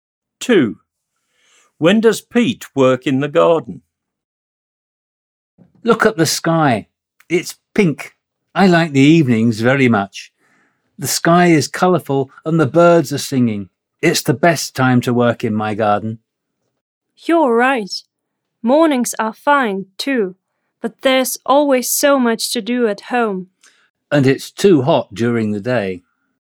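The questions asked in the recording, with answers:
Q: When does Pete work in the garden?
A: In the evening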